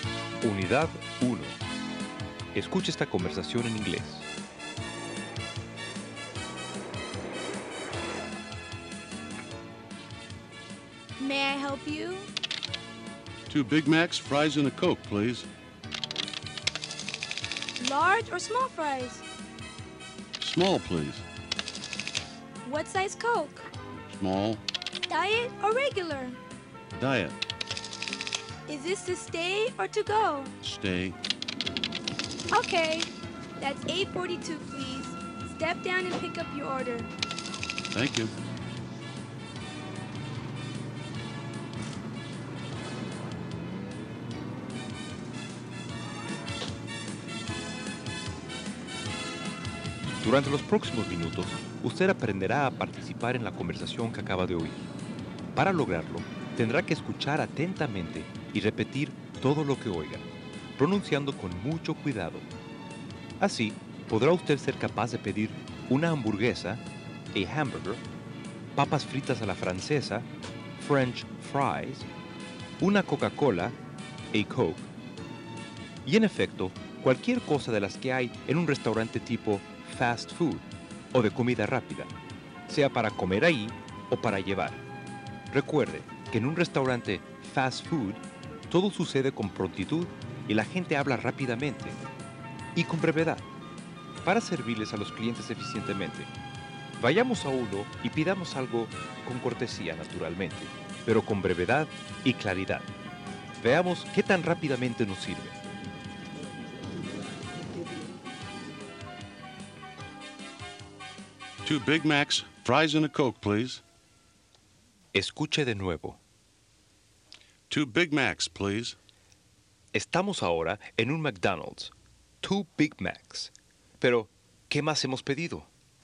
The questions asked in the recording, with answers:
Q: 2 Big Macs. Pero, ¿qué más hemos pedido?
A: Fries and a Coke.